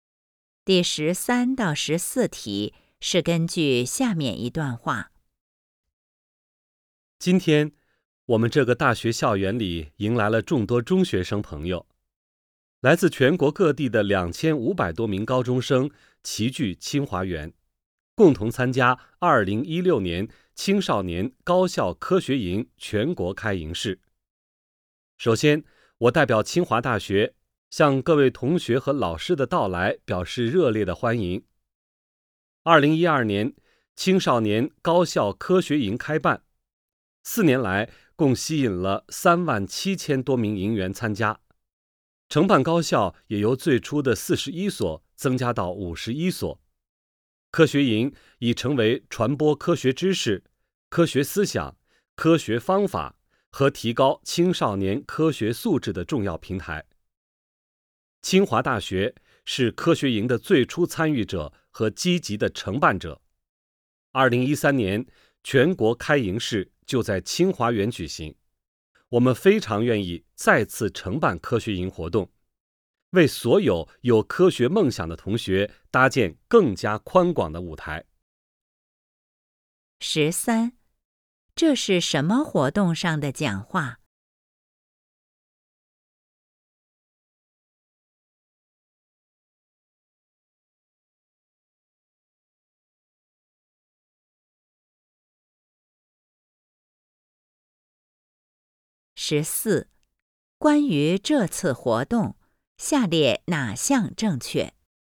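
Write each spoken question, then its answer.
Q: 这是什么活动上的讲话?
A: 2016年青少年高校科学营全国开营式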